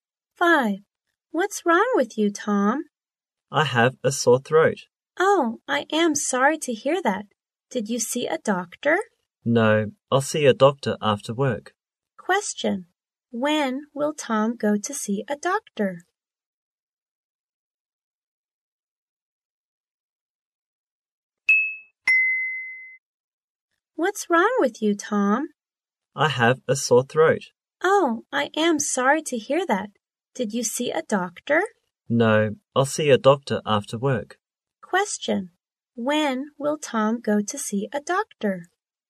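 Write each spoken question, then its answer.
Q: When will Tom go to see a doctor?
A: After work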